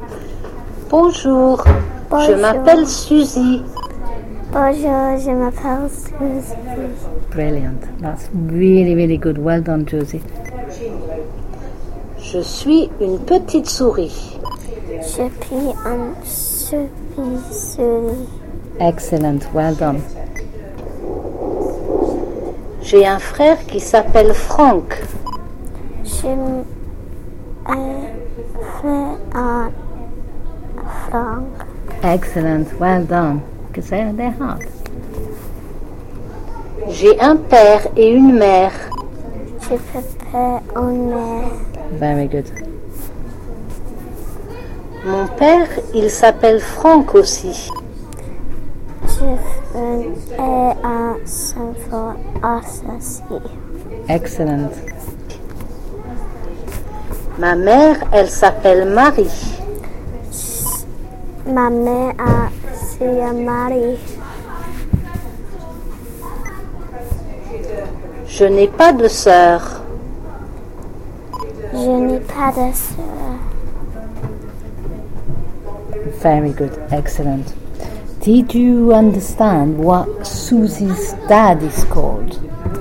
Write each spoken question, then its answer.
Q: Did you understand what Susie's dad is called?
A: Franck.